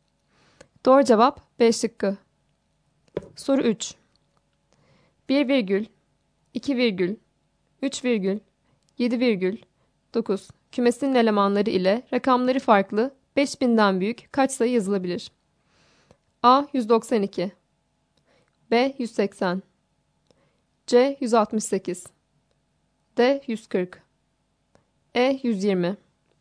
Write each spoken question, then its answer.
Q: 1 virgül, 2 virgül, 3 virgül, 7 virgül, 9 kümesinin elemanları ile rakamları farklı 5000'den büyük kaç sayı yazılabilir?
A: Doğru cevap C şıkkı.